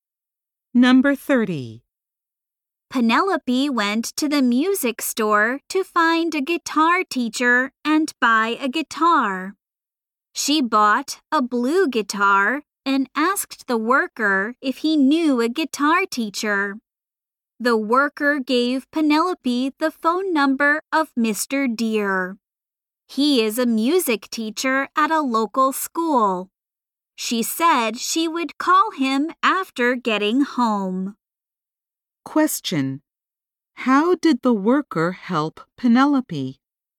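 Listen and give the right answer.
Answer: He gave her the phone number of a guitar teacher, Mr. Deer.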